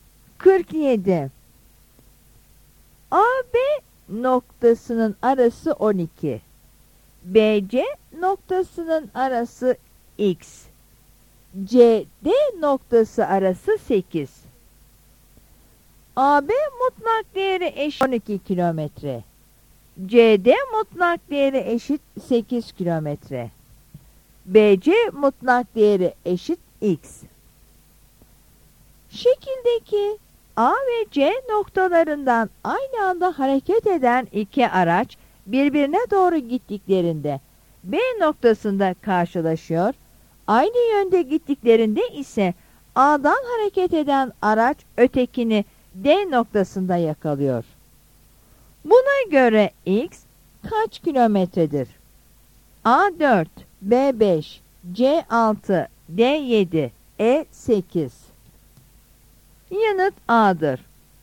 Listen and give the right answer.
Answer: Yanıt A'dır.